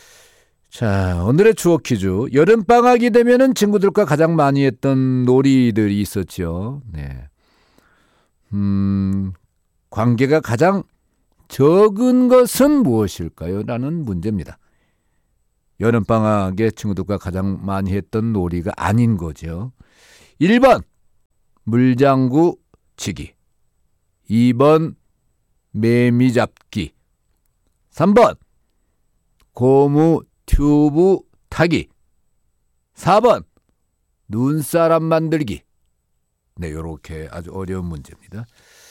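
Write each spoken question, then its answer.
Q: 관계가 가장 적은 것은 무엇일까요?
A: 4: 눈사람 만들기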